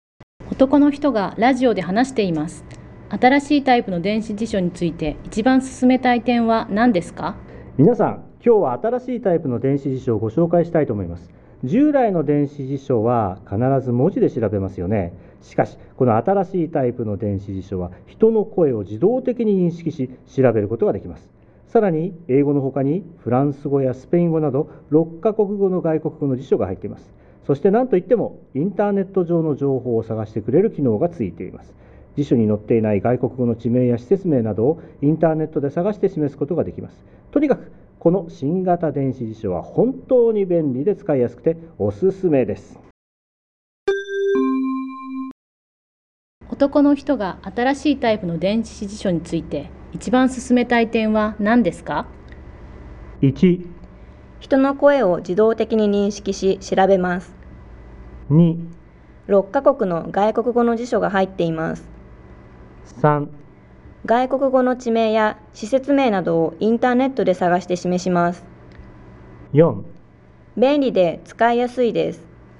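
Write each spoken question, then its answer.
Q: 男の人が新しいタイプの電子辞書について一番進めたい点は何ですか?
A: 3: 外国語の地名や施設名などをインターネットで探して示します。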